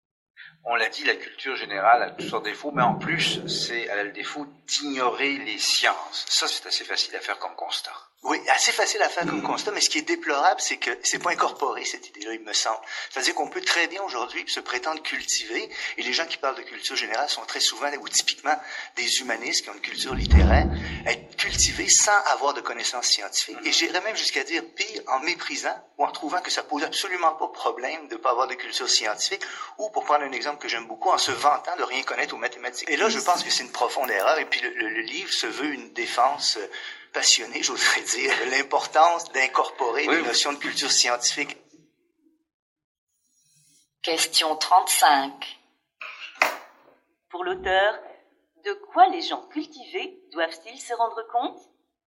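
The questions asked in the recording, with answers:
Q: Pour l'auteur, de quoi les gens cultivés doivent-ils se rendre compte?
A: De l'importance de la culture scientifique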